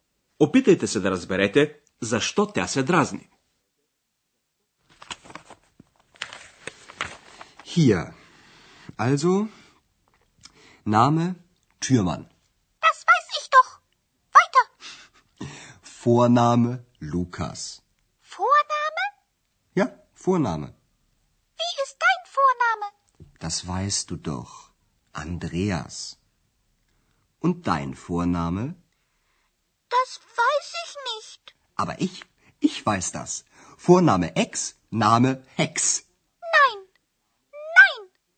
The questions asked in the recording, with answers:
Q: Опитайте се да разберете, защо тя се дразни.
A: Екс е ядосана, защото Андреас и измисли едно фамилно име, римувано с нейното лично име.